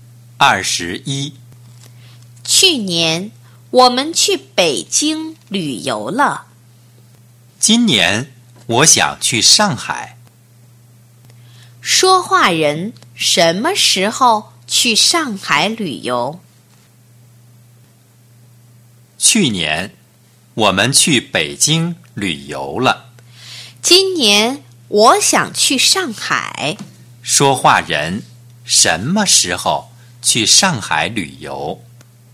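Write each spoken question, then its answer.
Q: 说话人什么时候去上海旅游?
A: 今年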